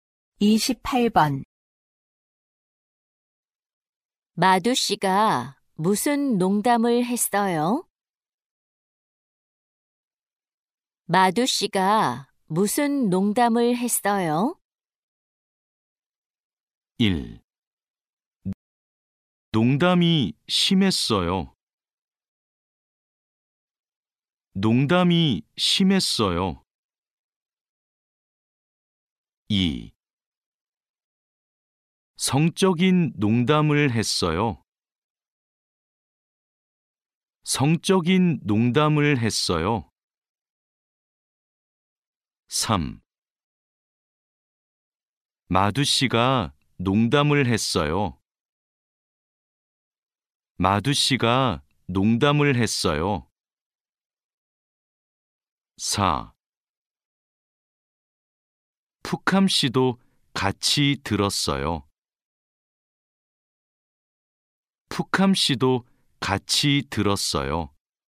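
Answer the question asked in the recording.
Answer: 2: 성적인 농담을 했어요.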